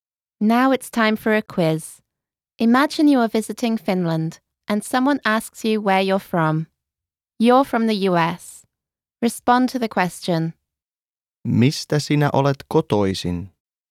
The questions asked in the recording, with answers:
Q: Mistä sinä olet kotoisin?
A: Olen kotoisin Yhdysvalloista.